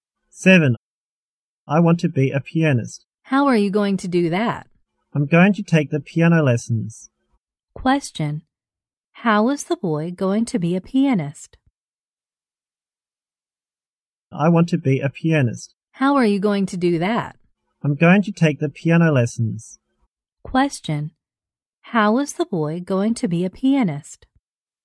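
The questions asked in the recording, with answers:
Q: Question. How is the boy going to be a pianist?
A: By taking piano lessons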